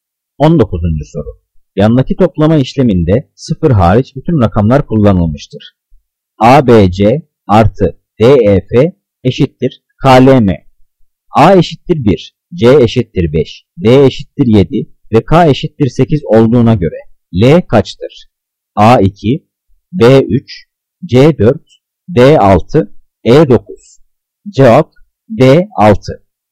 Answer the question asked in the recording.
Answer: Cevap D6.